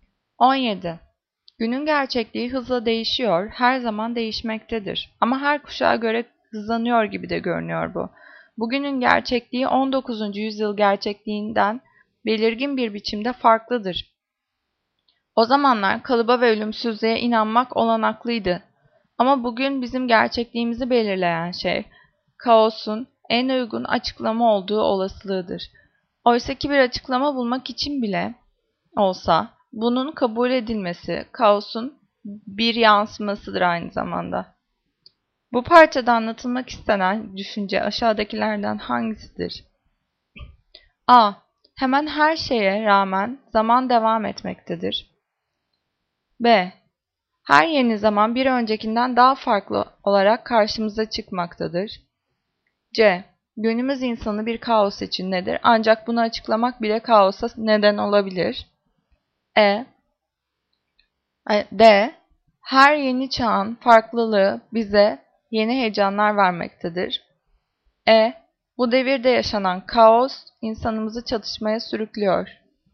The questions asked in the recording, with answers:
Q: Bu parçada anlatılmak istenen düşünce aşağıdakilerden hangisidir?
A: Cevap C. Günümüz insanı bir kaos içindedir.